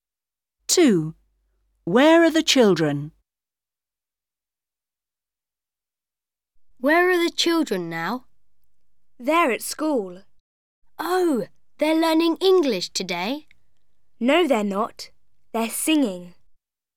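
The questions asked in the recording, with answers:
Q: Where are the children?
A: At school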